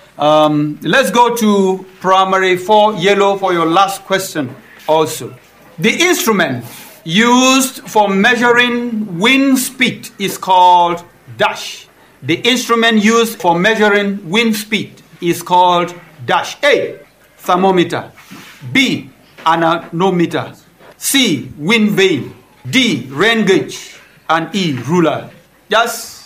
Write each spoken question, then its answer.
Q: The instrument used for measuring wind speed is called dash.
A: B, anemometer.